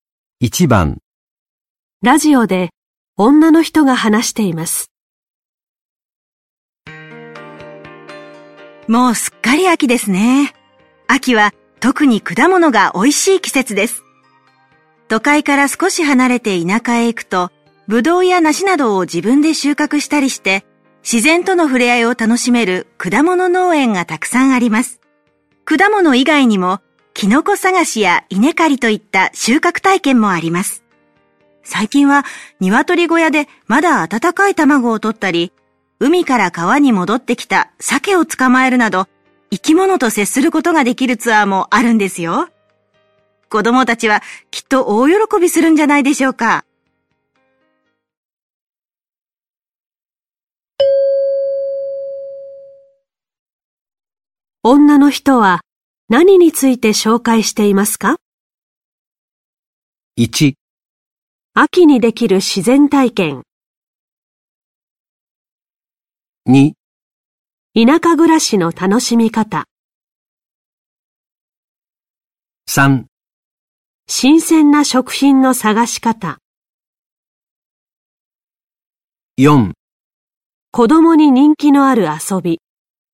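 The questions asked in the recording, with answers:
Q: 女の人は何について紹介していますか?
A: 1: 秋にできる自然体験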